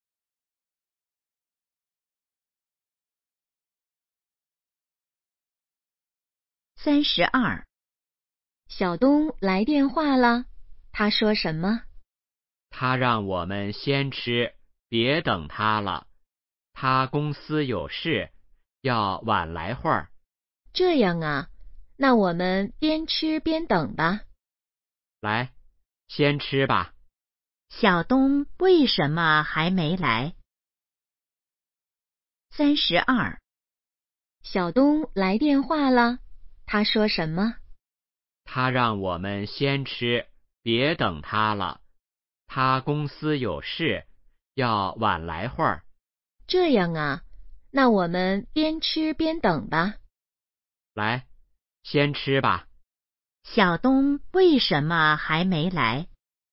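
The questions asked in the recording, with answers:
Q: 小东为什么还没来?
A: 公司有事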